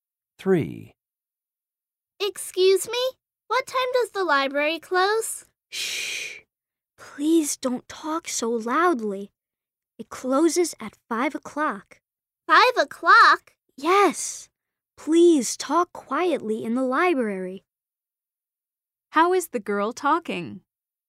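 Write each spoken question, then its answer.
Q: How is the girl talking?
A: loudly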